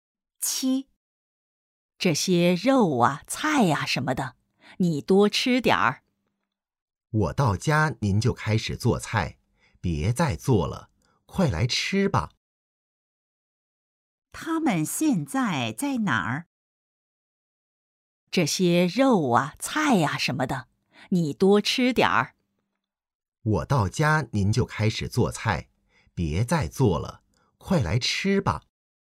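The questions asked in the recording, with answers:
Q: 他们现在在哪儿?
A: 在家里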